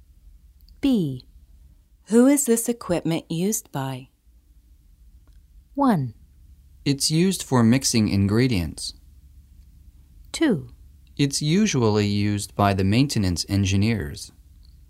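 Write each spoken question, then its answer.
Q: Who is this equipment used by?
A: 2: It's usually used by the maintenance engineers.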